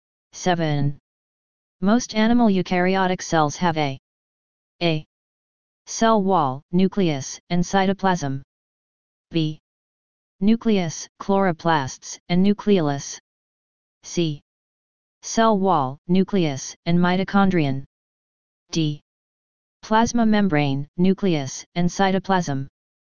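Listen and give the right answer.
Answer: D: Plasma membrane, nucleus, and cytoplasm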